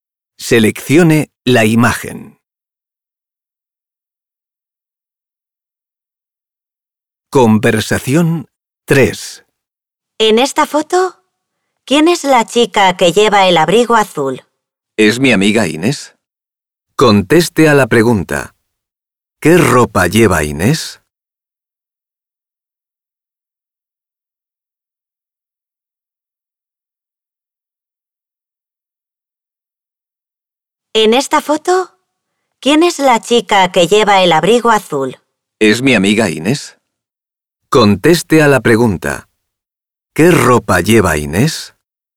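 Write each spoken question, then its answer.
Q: ¿Qué ropa lleva Inés?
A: Un abrigo azul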